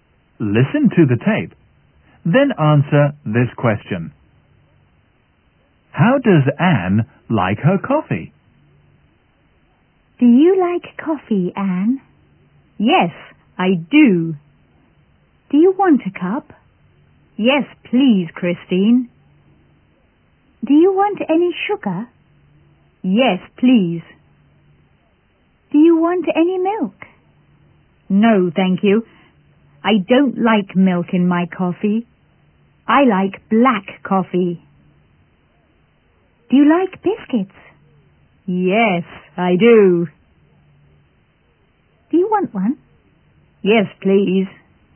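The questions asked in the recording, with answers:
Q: How does Anne like her coffee?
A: Black, with sugar and no milk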